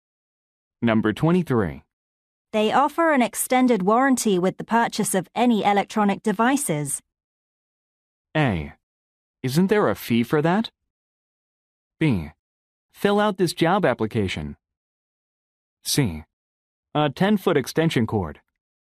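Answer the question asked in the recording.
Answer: A: Isn't there a fee for that?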